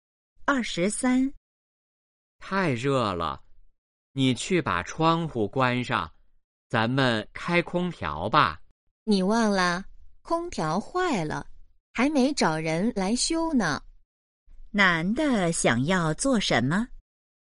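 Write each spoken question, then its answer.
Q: 男的想要做什么?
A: 开空调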